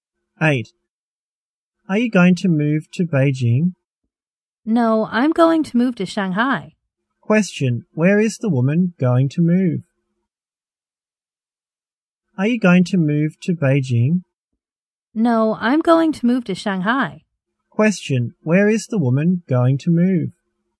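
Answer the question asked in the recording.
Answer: Shanghai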